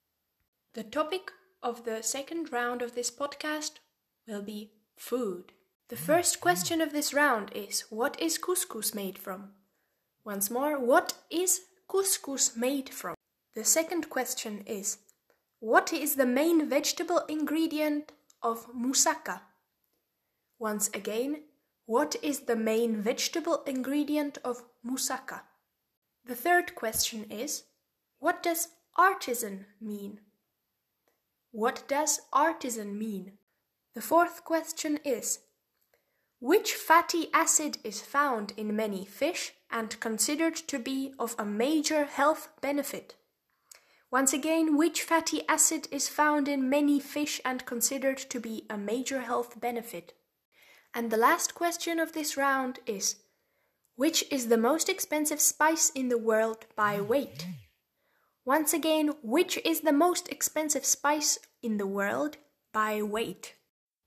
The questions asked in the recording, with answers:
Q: which is the most expensive spice in the world by weight?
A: And the answer to the final question of this round, question number five, is saffron.